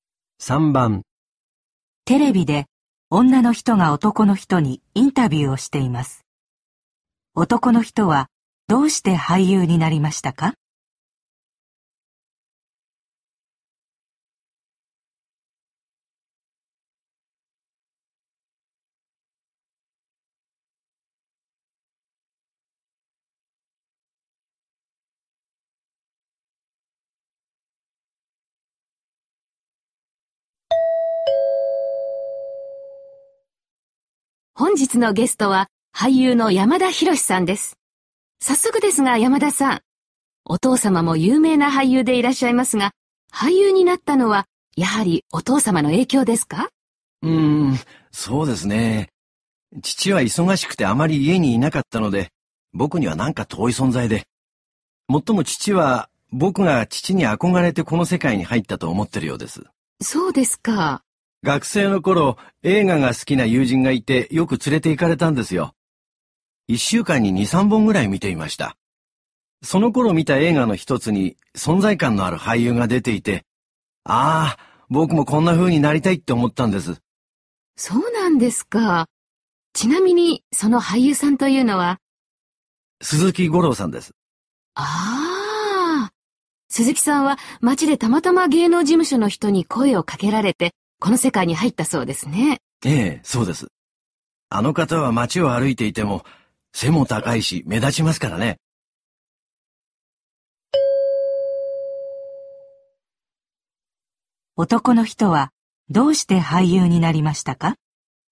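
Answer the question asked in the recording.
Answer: 映画で存在感のある俳優を見て憧れたから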